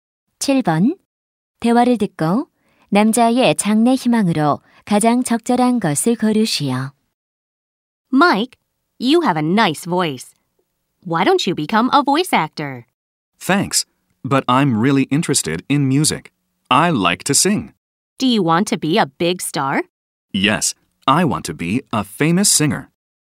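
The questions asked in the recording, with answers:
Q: 대화를 듣고 남자의 장래 희망으로 가장 적절한 것을 고르시오.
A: 가수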